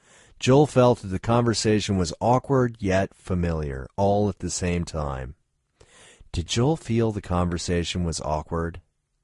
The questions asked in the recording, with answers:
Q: Did Joel feel the conversation was awkward?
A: Yes, Joel felt the conversation was awkward.